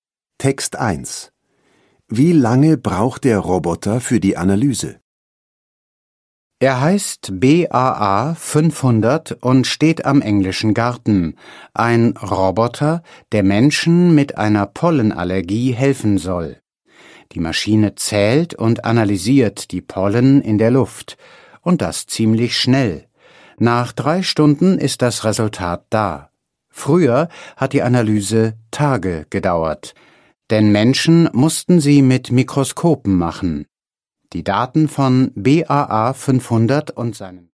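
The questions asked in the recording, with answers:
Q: Wie lange braucht der Roboter für die Analyse?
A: 3 Stunden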